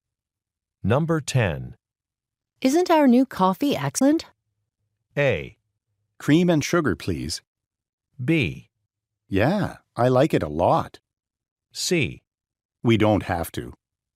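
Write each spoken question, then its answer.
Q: Isn't our new coffee excellent?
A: B: Yeah, I like it a lot.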